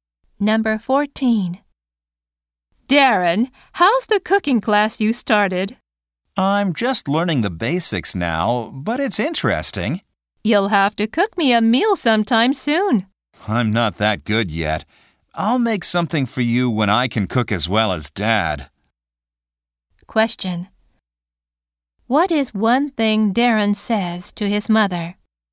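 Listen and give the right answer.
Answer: He'll cook for her when he can cook as well as Dad.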